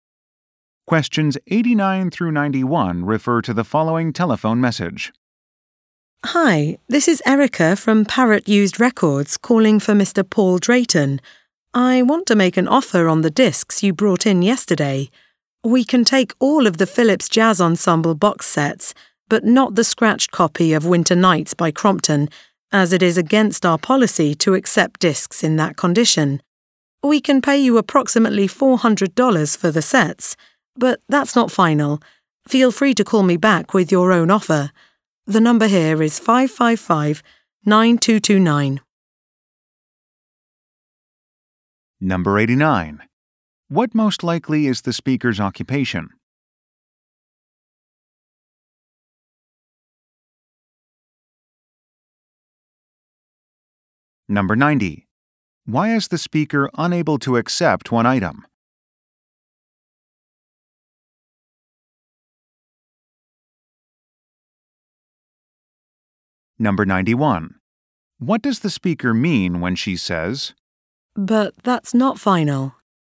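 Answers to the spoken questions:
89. Used record store employee
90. It is scratched
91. The price can be negotiated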